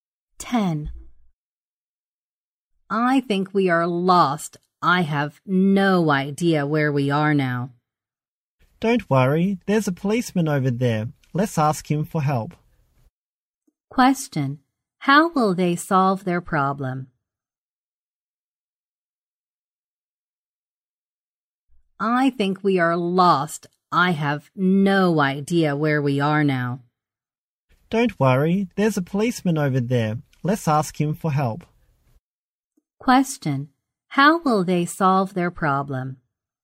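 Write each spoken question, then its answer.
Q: How will they solve their problem?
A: By asking a policeman for help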